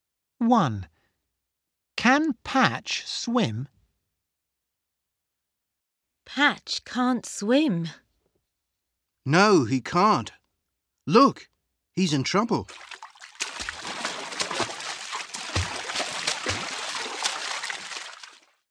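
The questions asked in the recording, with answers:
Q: Can Patch swim?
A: No, he can't.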